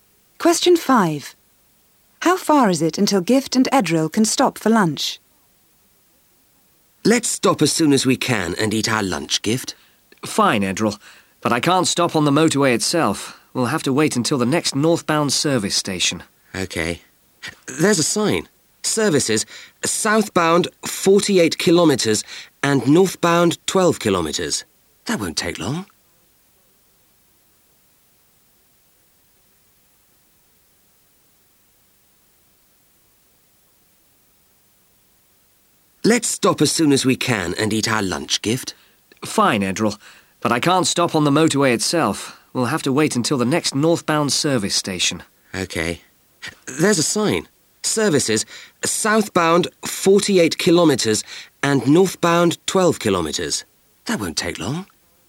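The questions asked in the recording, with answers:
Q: How far is it until Gift and Edril can stop for lunch?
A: 12 kilometres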